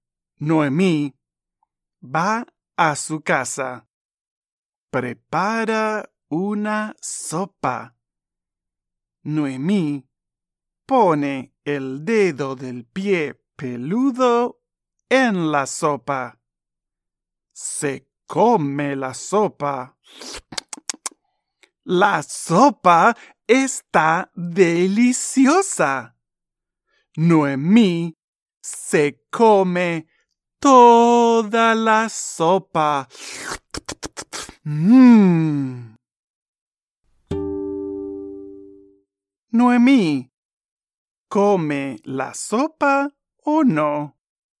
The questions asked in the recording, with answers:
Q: Noemí, ¿come la sopa o no?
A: Sí, come la sopa.